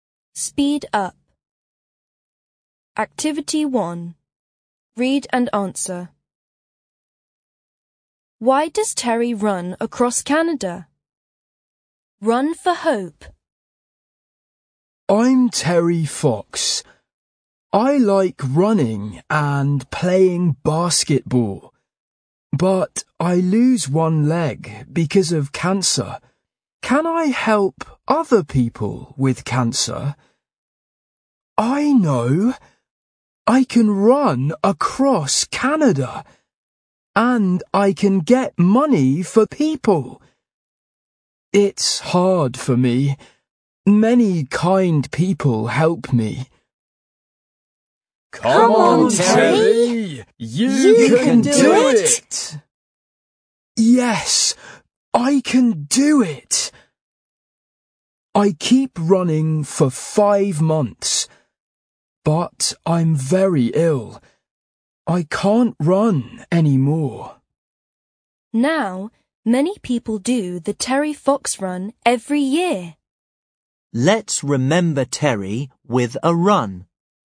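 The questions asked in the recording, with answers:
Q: Why does Terry run across Canada?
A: To get money to help people with cancer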